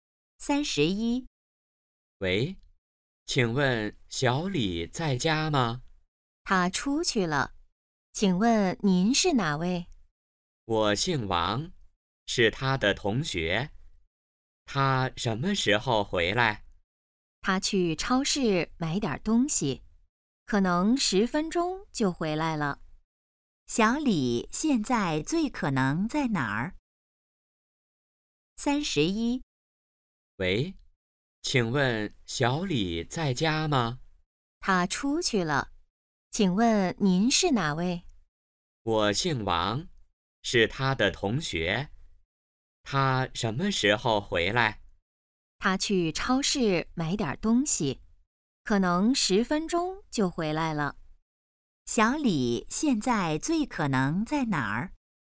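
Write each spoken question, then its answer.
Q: 小李现在最可能在哪儿?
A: 超市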